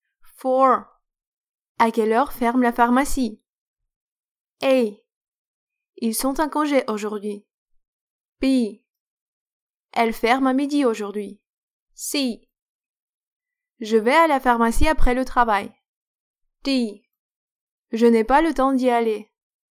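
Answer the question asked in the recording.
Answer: B: Elle ferme à midi aujourd'hui.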